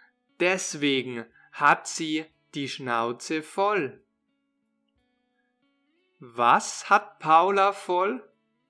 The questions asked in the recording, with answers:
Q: Was hat Paula voll?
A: die Schnauze.